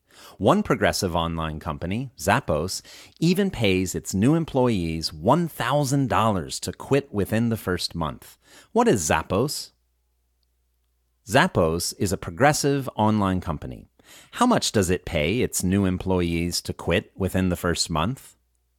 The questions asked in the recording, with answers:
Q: How much does it pay its new employees to quit within the first month?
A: It pays its new employees $1,000 to quit within the first month.